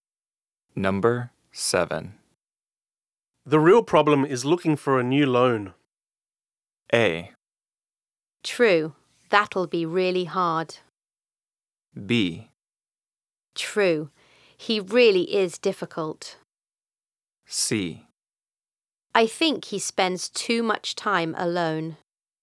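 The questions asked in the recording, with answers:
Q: The real problem is looking for a new loan.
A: A: True, that'll be really hard.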